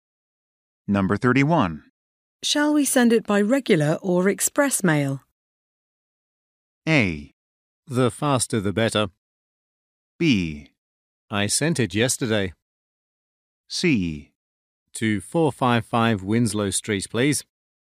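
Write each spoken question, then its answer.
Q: Shall we send it by regular or express mail?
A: A: The faster the better.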